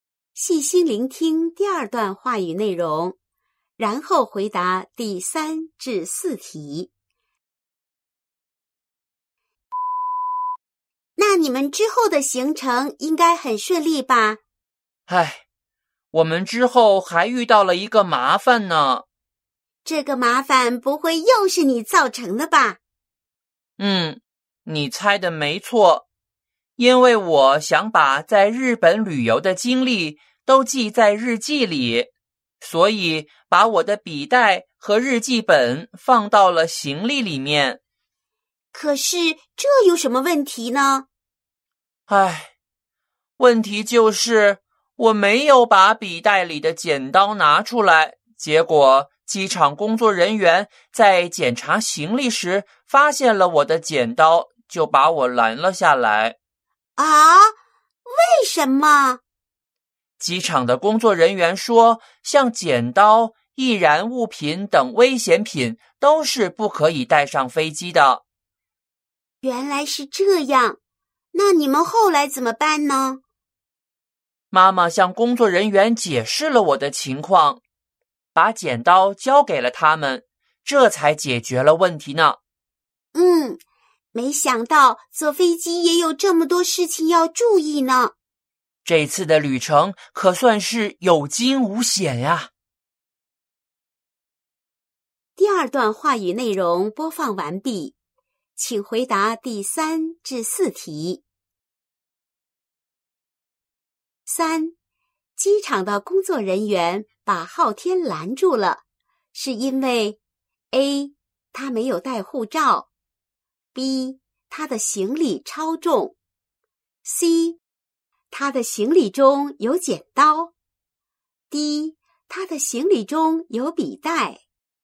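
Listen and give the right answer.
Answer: C: 他的行李中有剪刀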